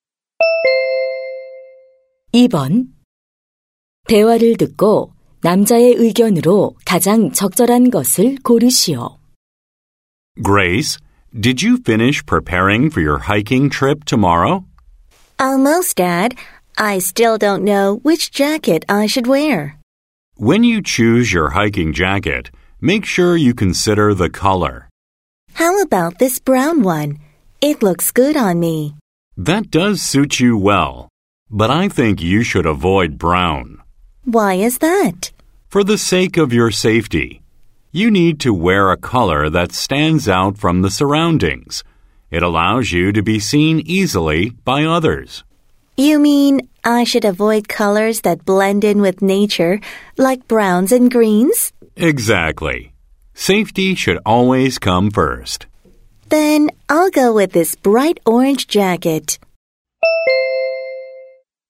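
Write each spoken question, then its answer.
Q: 대화를 듣고 남자의 의견으로 가장 적절한 것을 고르시오.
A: 등산할 때는 안전을 위해 눈에 잘 띄는 색의 옷을 입어야 한다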